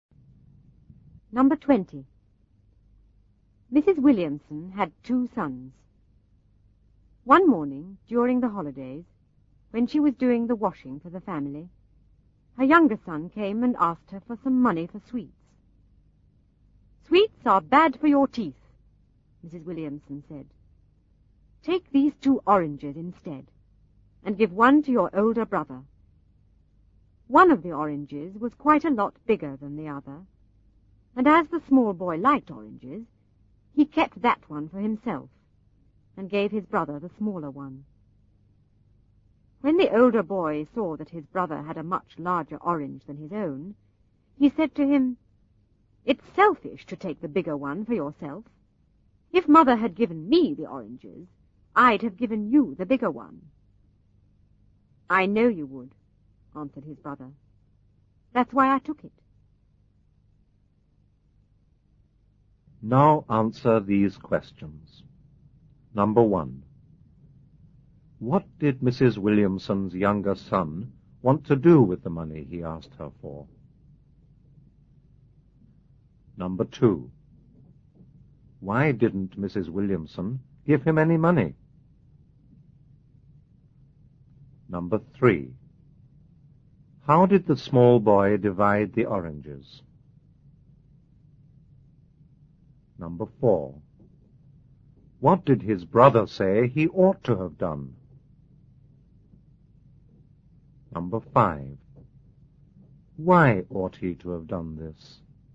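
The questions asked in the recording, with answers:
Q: What did Mrs. Williamson's younger son want to do with the money he asked her for?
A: Buy sweets

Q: Why didn't Mrs. Williamson give him any money?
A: Because sweets are bad for his teeth

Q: How did the small boy divide the oranges?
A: He kept the bigger one and gave his brother the smaller one

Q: What did his brother say he ought to have done?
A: Given him the bigger orange

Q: Why ought he to have done this?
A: Because it is selfish to take the bigger one for yourself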